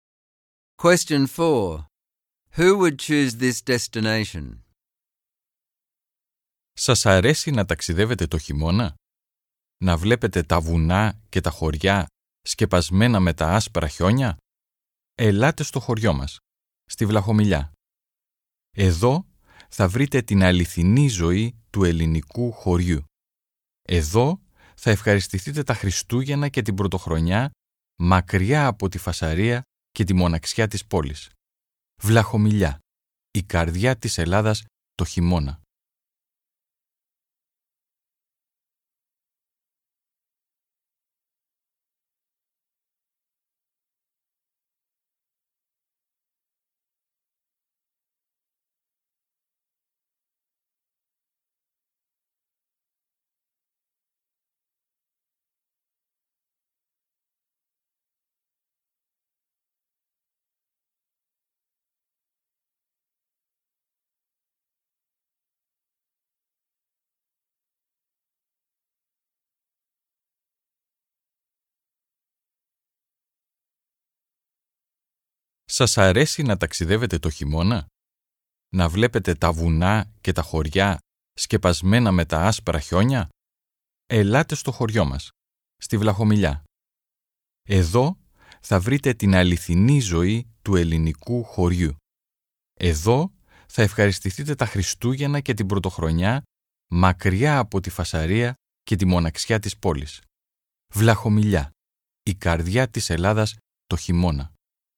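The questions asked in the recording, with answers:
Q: Who would choose this destination?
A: People who like to travel in winter and see snowy mountains and villages, and who want real Greek village life at Christmas and New Year, away from the noise and loneliness of the city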